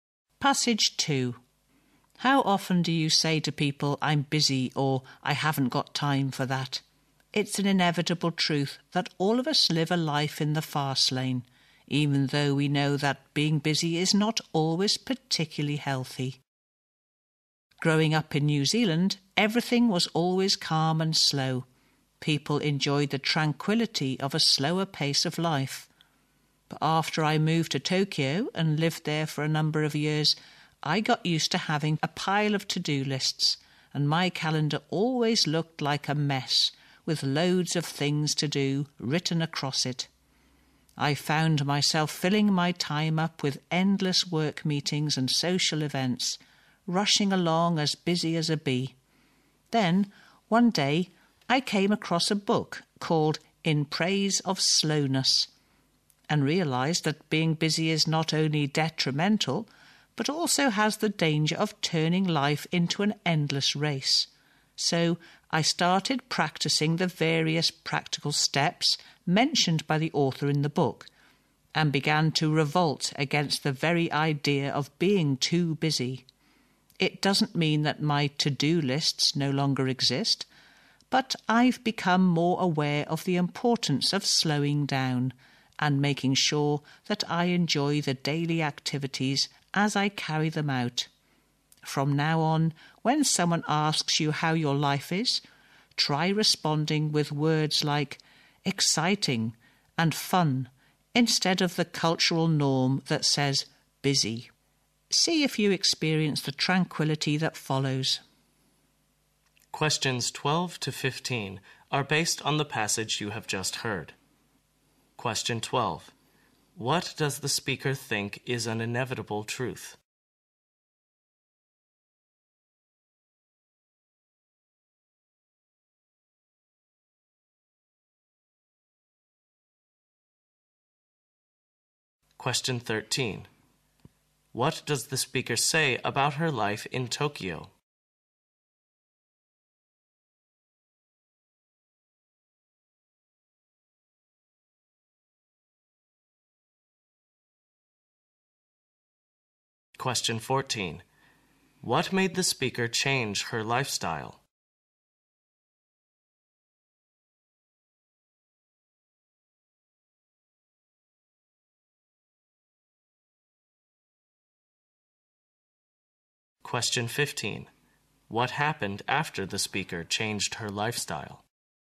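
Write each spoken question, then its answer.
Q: What does the speaker think is an inevitable truth?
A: All of us live a life in the fast lane

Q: What does the speaker say about her life in Tokyo?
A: She was always busy with to-do lists, work meetings and social events

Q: What made the speaker change her lifestyle?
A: Reading the book In Praise of Slowness

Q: What happened after the speaker changed her lifestyle?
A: She became more aware of slowing down and enjoying daily activities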